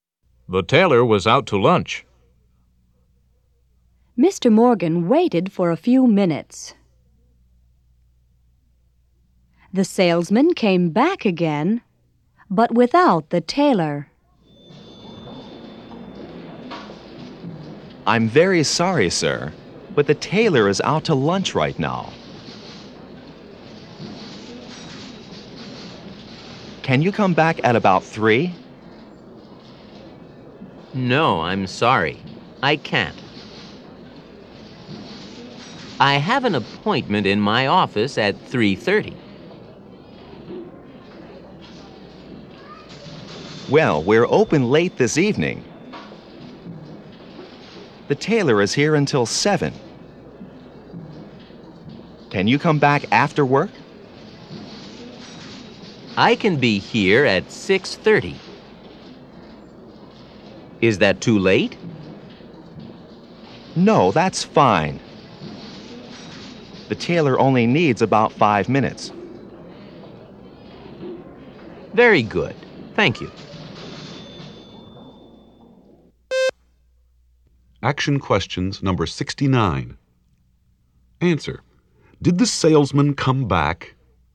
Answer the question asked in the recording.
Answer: Yes, he did.